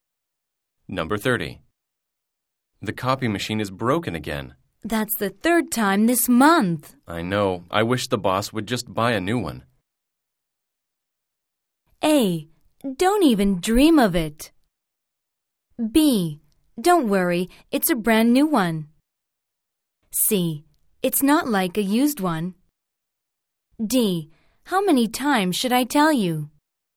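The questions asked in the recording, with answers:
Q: I know. I wish the boss would just buy a new one.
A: A: Don't even dream of it.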